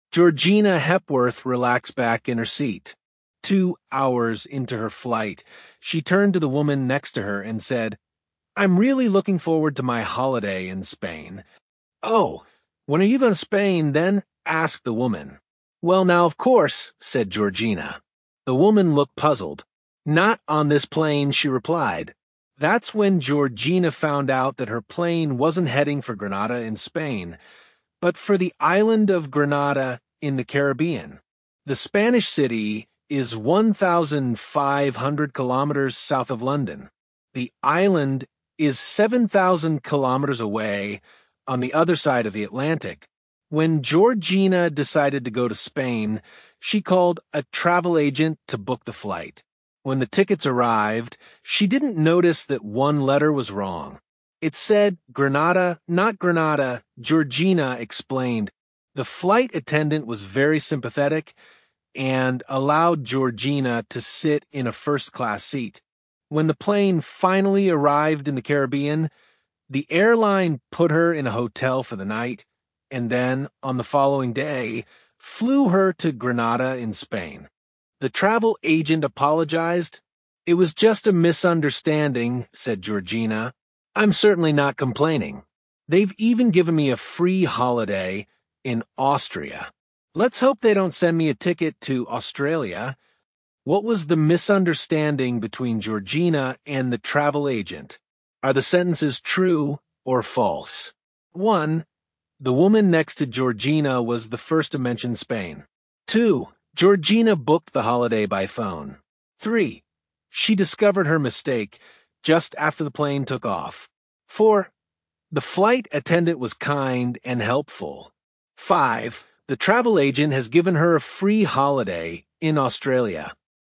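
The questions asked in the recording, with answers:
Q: What was the misunderstanding between Georgina and the travel agent?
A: The agent booked a flight to Grenada in the Caribbean instead of Granada in Spain

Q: The woman next to Georgina was the first to mention Spain.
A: False

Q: Georgina booked the holiday by phone.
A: True

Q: She discovered her mistake just after the plane took off.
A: False

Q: The flight attendant was kind and helpful.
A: True

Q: The travel agent has given her a free holiday in Australia.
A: False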